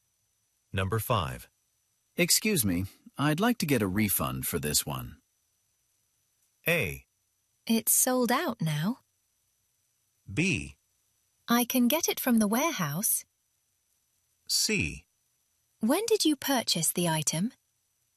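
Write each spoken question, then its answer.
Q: Excuse me, I'd like to get a refund for this one.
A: C: When did you purchase the item?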